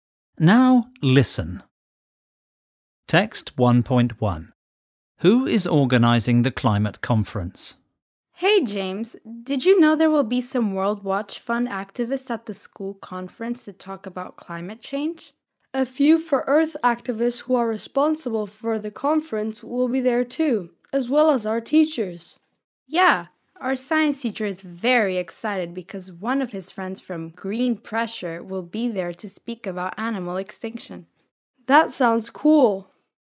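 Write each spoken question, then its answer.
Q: Who is organizing the climate conference?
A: For Earth activists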